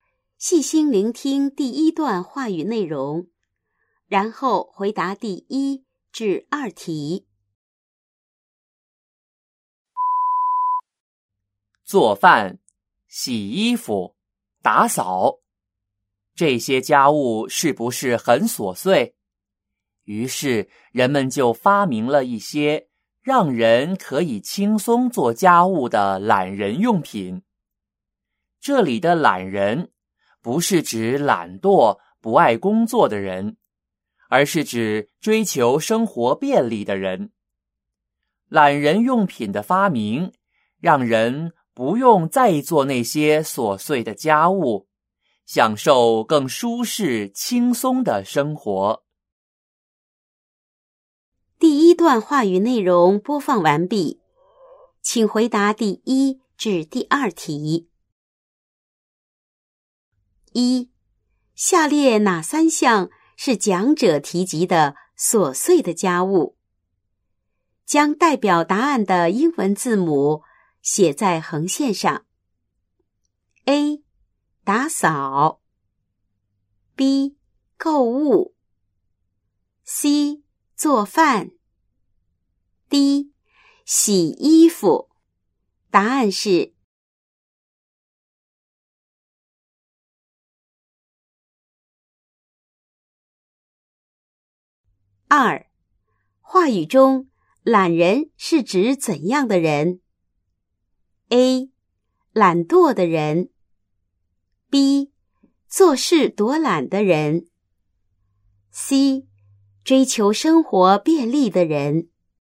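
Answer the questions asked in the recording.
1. A、C、D: 打扫、做饭、洗衣服
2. C: 追求生活便利的人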